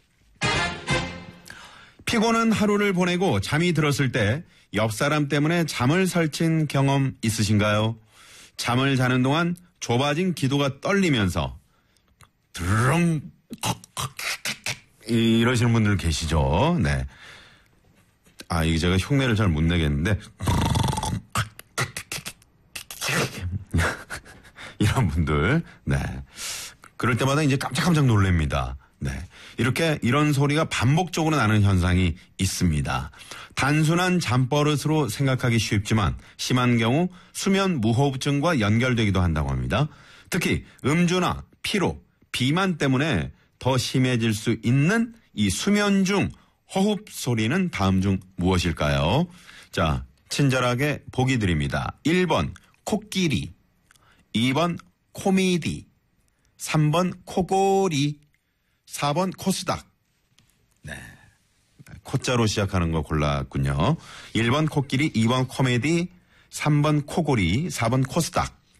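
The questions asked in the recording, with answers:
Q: 특히 음주나 피로, 비만 때문에 더 심해질 수 있는 이 수면 중 호흡 소리는 다음 중 무엇일까요?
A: 3: 코골이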